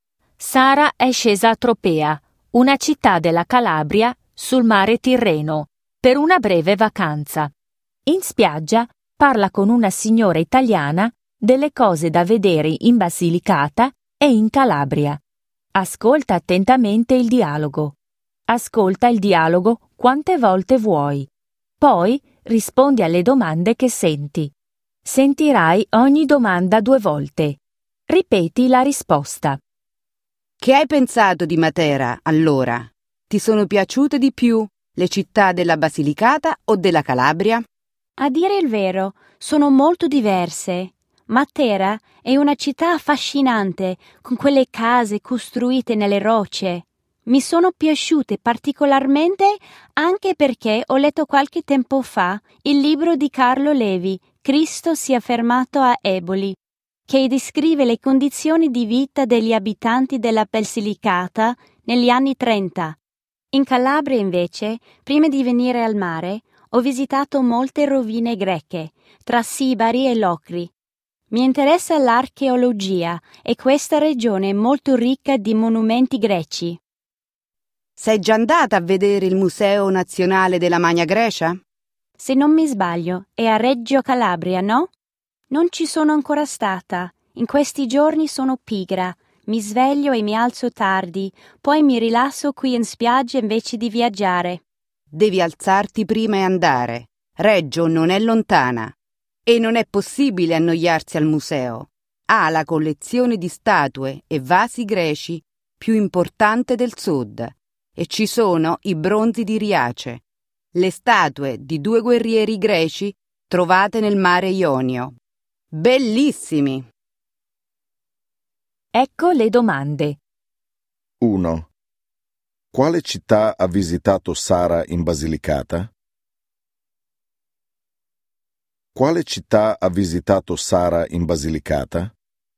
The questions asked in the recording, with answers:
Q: Quale città ha visitato Sara in Basilicata?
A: Ha visitato Matera.